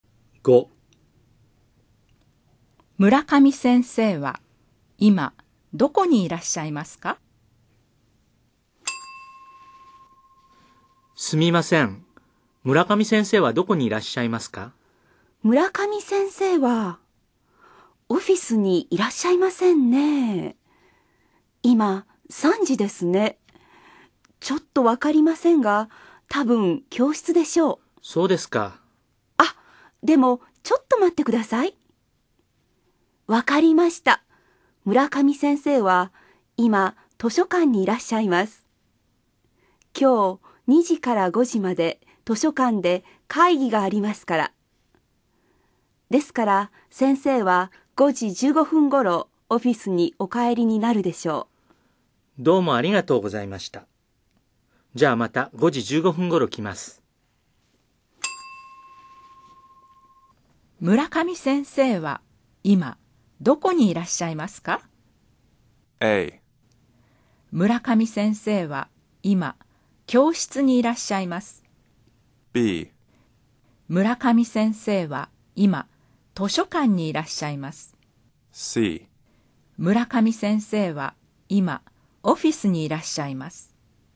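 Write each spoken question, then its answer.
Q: 村上先生は今どこにいらっしゃいますか?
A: B: 村上先生は今図書館にいらっしゃいます。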